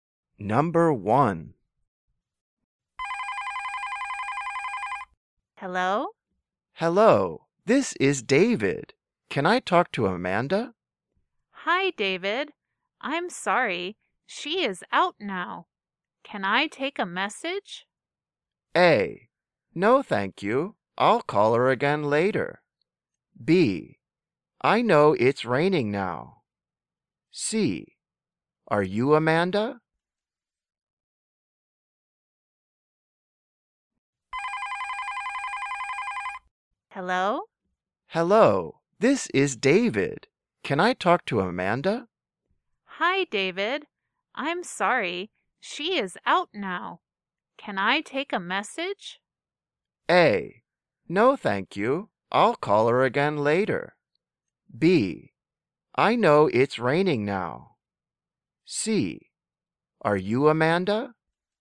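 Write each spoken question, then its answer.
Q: Can I take a message?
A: A: No, thank you. I'll call her again later.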